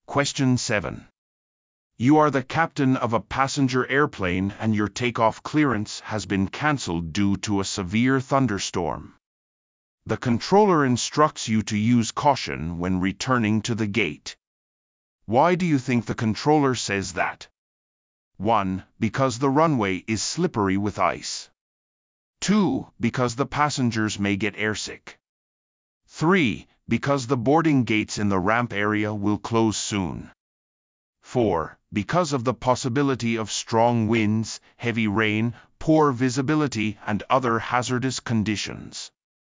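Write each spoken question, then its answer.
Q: Why do you think the controller says that?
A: 4: Because of the possibility of strong winds, heavy rain, poor visibility, and other hazardous conditions.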